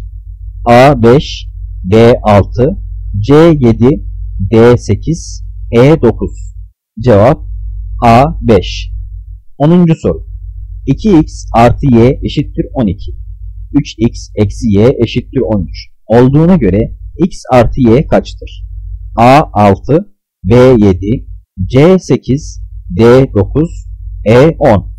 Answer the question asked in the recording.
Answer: Cevap B 7.